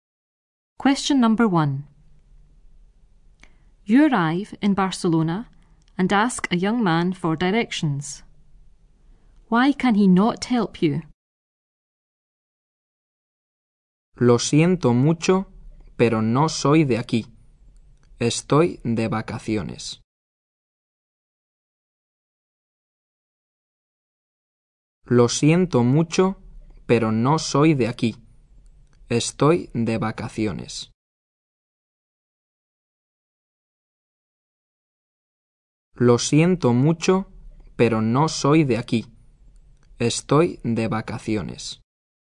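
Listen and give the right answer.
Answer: He is not from here; he is on holiday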